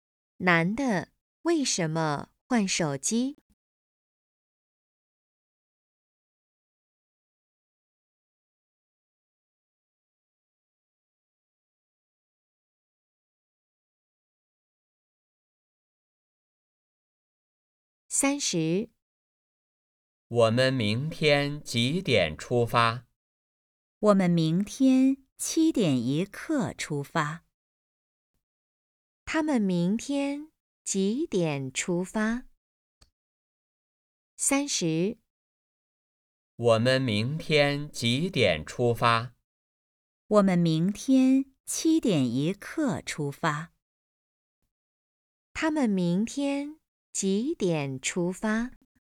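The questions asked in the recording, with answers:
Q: 他们明天几点出发?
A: 七点一刻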